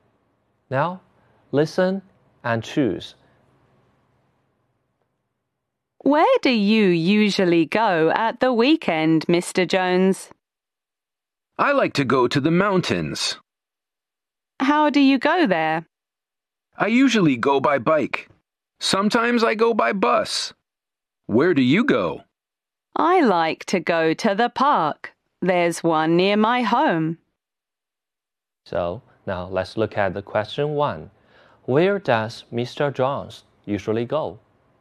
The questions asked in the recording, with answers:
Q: Where does Mr. Jones usually go?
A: A. He says, I go to the mountains.